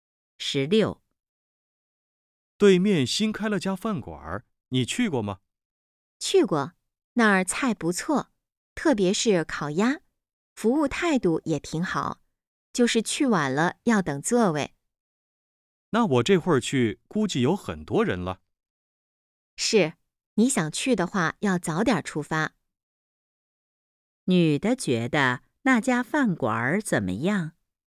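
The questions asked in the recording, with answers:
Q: 女的觉得那家饭馆怎么样?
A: 菜不错,服务态度好,但去晚了要等座位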